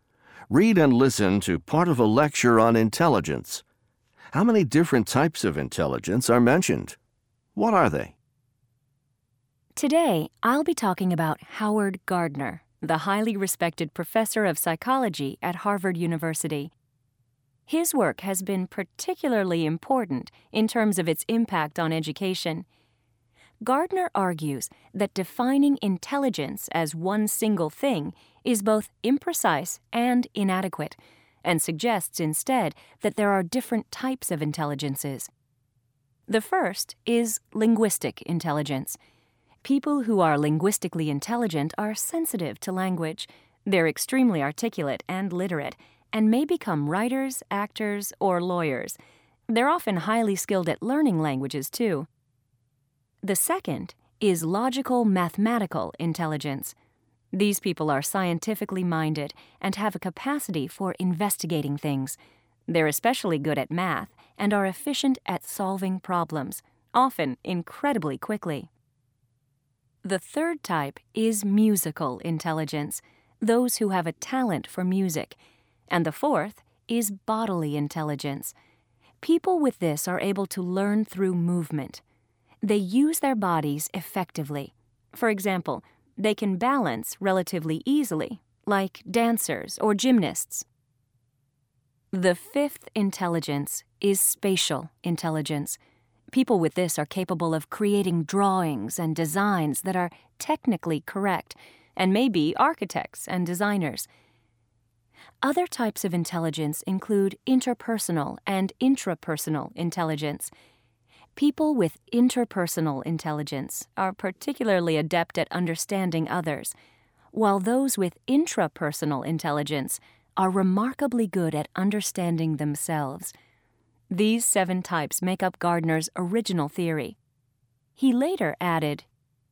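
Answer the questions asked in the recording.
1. Seven
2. Linguistic, logical-mathematical, musical, bodily, spatial, interpersonal and intrapersonal intelligence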